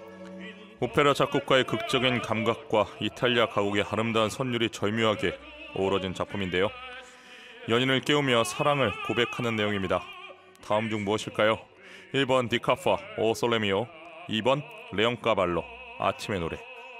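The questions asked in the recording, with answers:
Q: 연인을 깨우며 사랑을 고백하는 내용입니다. 다음 중 무엇일까요?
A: 2번: 레옹 까발로 아침의 노래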